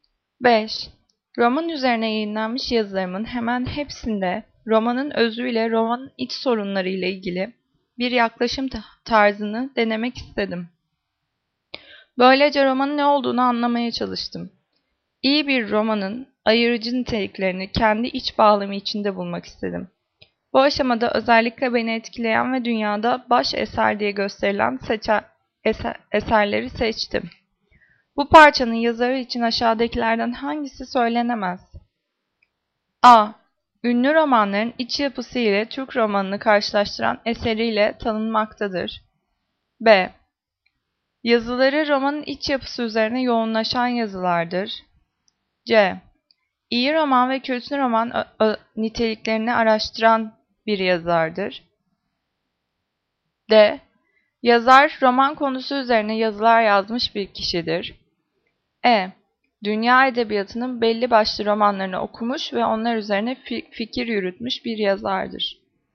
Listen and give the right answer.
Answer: Cevap A. Ünlü romanların iç yapısı ile Türk romanını karşılaştıran bir eseriyle tanınmaktadır.